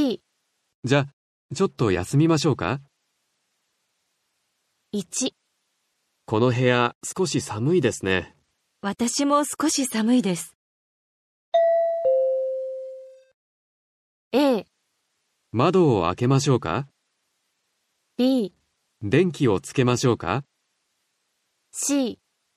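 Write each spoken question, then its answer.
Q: この部屋少し寒いですね。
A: C: エアコンをつけましょうか。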